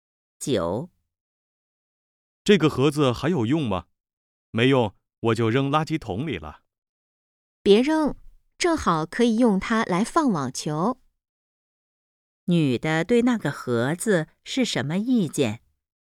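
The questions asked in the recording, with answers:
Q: 女的对那个盒子是什么意见?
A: 别扔,可以用来放网球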